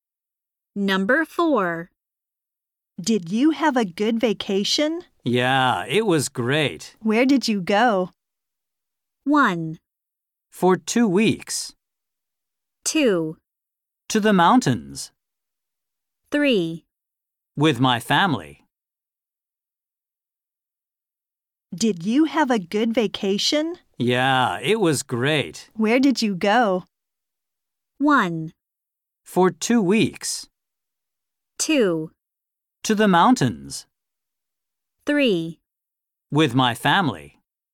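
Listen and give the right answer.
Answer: 2: To the mountains.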